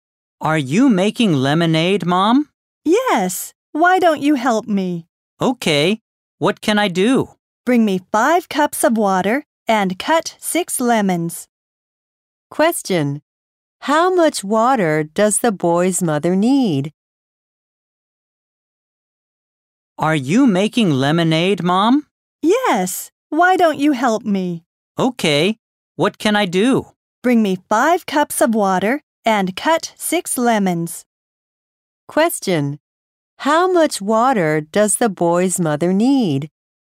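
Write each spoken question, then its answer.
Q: How much water does the boy's mother need?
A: 5 cups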